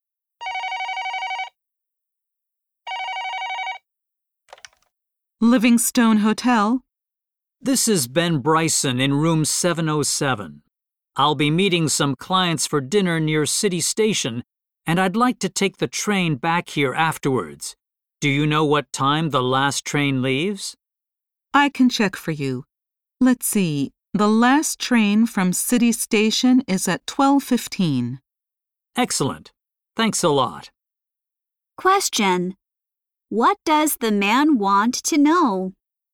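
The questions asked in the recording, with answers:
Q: What does the man want to know?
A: What time the last train leaves City Station.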